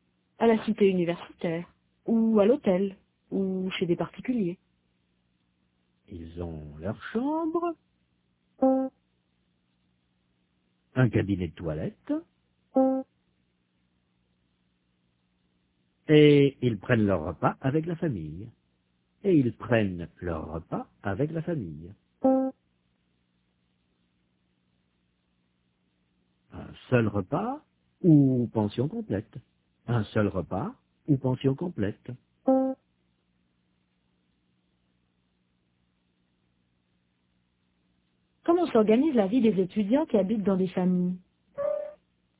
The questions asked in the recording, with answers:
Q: Comment s'organise la vie des étudiants qui habitent dans des familles?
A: Ils ont leur chambre, un cabinet de toilette, et ils prennent leur repas avec la famille.